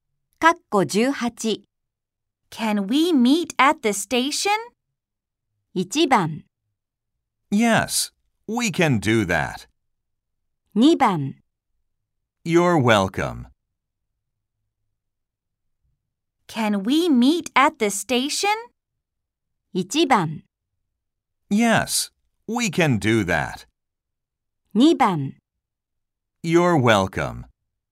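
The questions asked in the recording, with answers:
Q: Can we meet at the station?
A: 1: Yes, we can do that.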